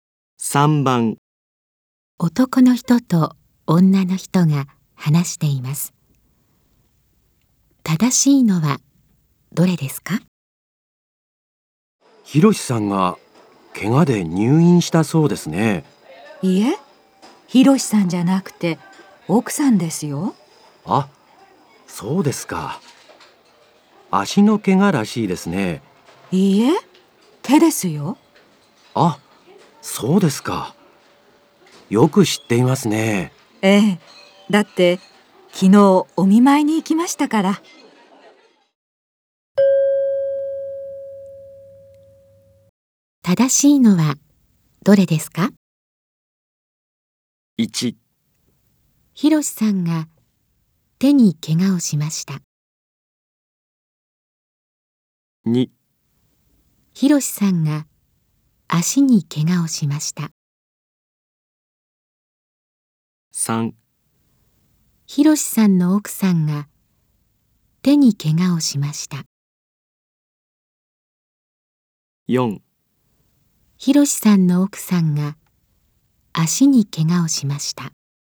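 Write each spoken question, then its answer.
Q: 正しいのはどれですか?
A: 3: ひろしさんの奥さんが手に怪我をしました。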